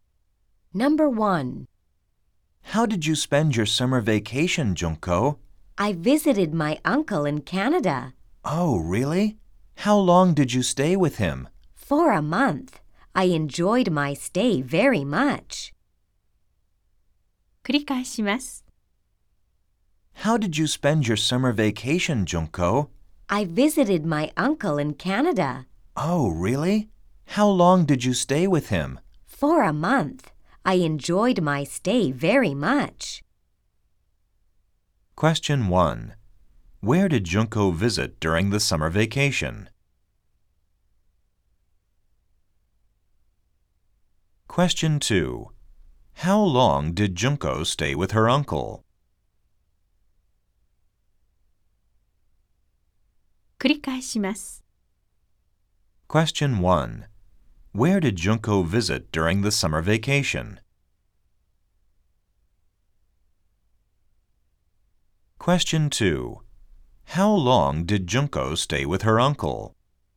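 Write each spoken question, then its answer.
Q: Where did Junko visit during the summer vacation?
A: Canada (her uncle in Canada)

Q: How long did Junko stay with her uncle?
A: For a month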